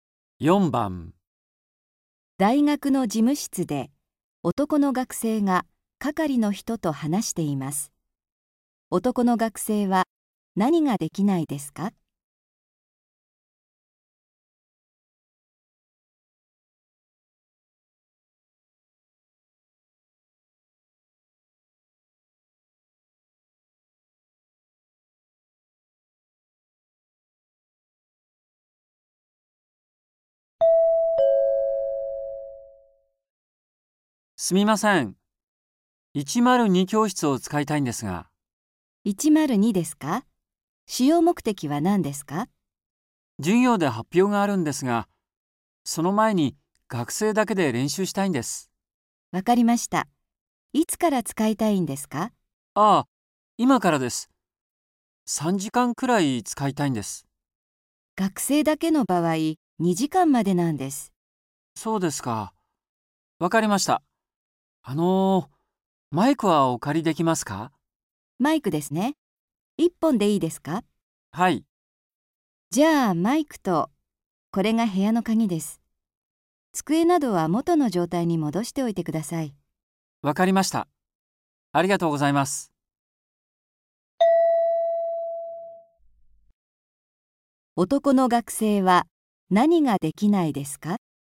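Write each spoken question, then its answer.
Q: 男の学生は何ができないですか?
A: 教室を3時間使うこと(学生だけでは2時間まで)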